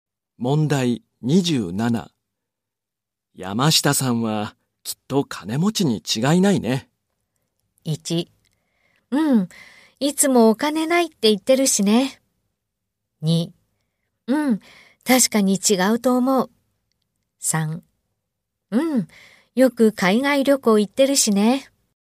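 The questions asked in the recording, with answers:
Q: 山下さんはきっと金持ちに違いないね。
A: 2: うん、よく海外旅行行ってるしね。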